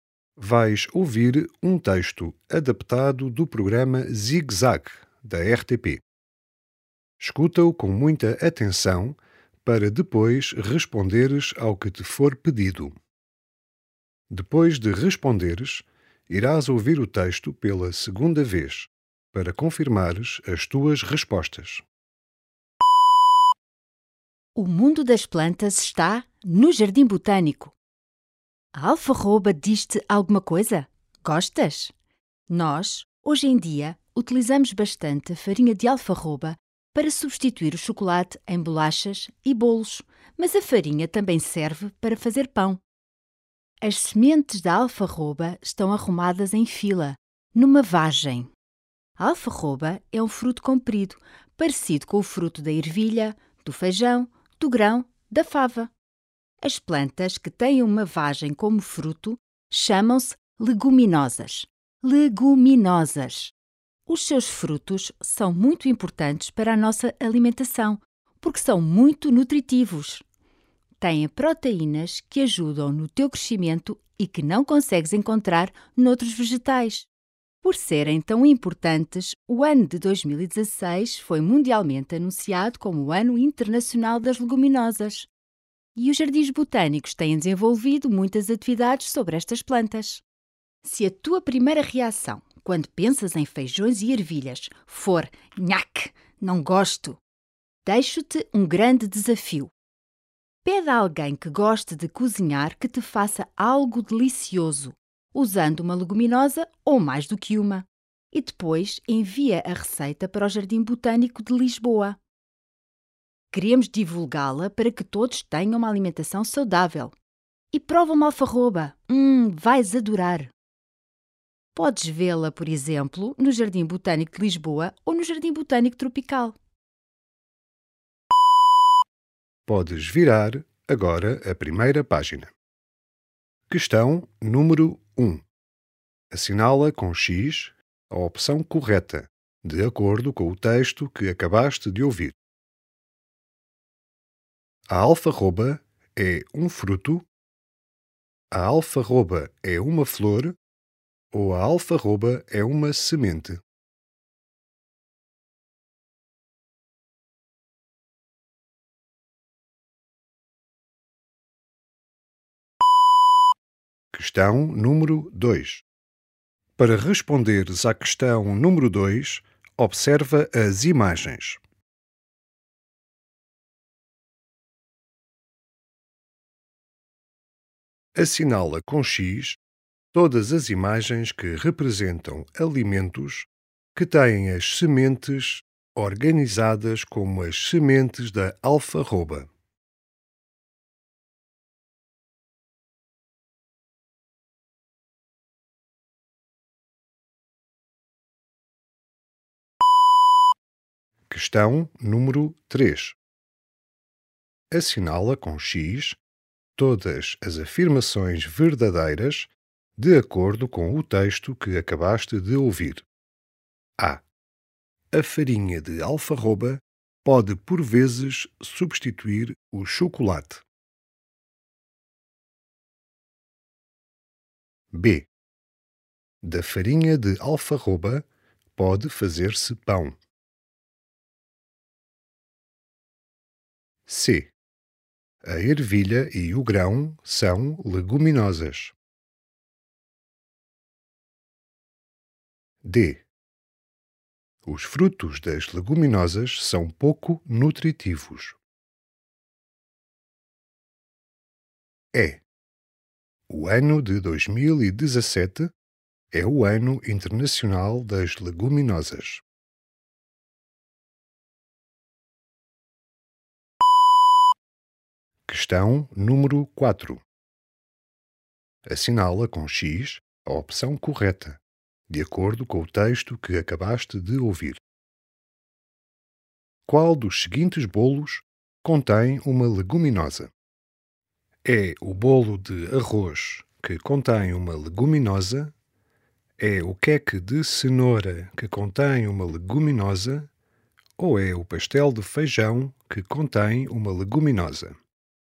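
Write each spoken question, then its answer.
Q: A alfarroba é um fruto? A alfarroba é uma flor? Ou a alfarroba é uma semente?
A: A alfarroba é um fruto

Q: Assinala com X todas as afirmações verdadeiras de acordo com o texto que acabaste de ouvir.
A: A, B e C: a farinha de alfarroba pode substituir o chocolate; da farinha de alfarroba pode fazer-se pão; a ervilha e o grão são leguminosas

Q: Qual dos seguintes bolos contém uma leguminosa?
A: o pastel de feijão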